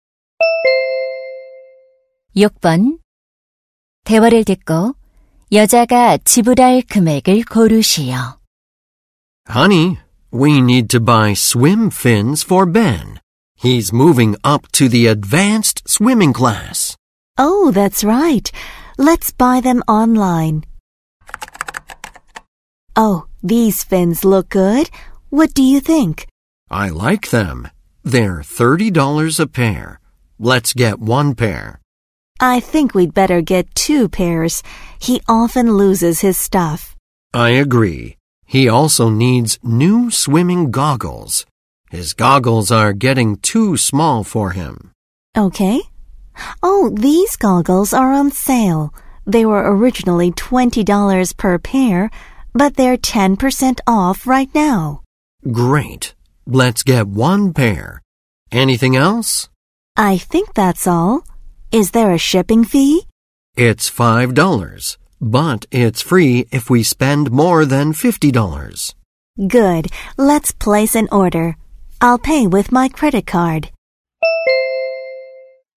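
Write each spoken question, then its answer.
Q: 대화를 듣고 여자가 지불할 금액을 고르시오.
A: 78달러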